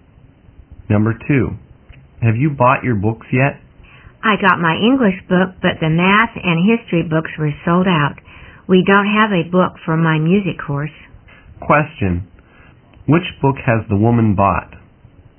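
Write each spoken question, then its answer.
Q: Question, which book has the woman bought?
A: Her English book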